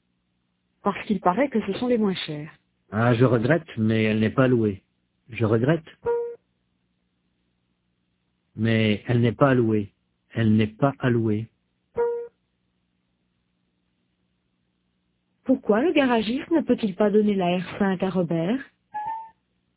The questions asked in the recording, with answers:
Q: Pourquoi le garagiste ne peut-il pas donner la R5 à Robert?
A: Parce qu'elle n'est pas allouée.